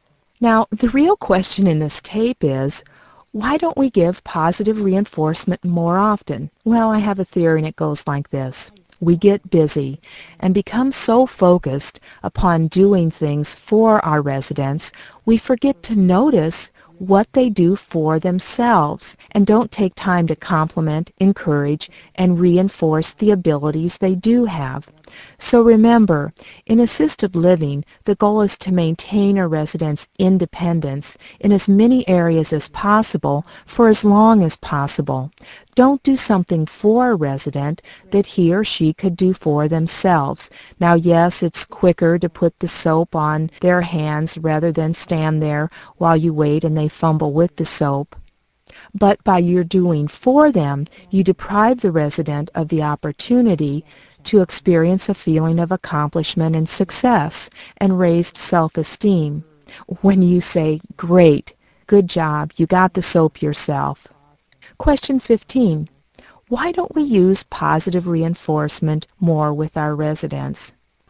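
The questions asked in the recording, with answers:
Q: Why don't we use positive reinforcement more with our residents?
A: We get busy doing things for residents and forget to notice what they do for themselves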